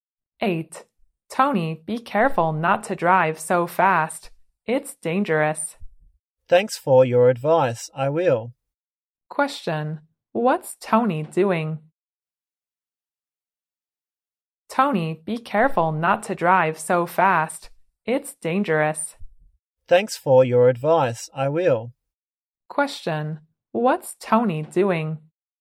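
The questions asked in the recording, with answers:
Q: What's Tony doing?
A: Driving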